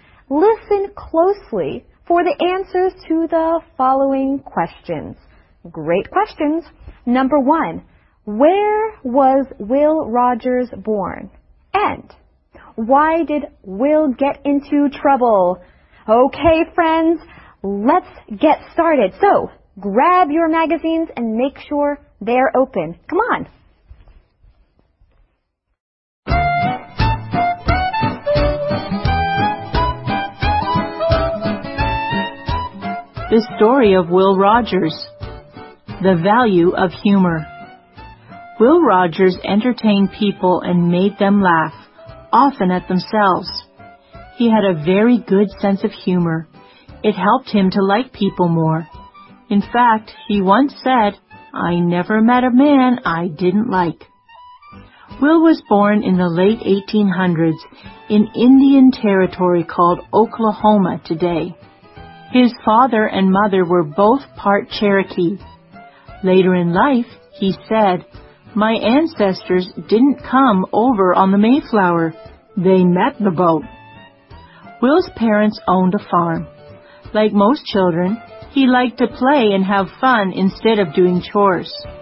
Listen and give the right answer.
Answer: He was born in Indian Territory called Oklahoma today.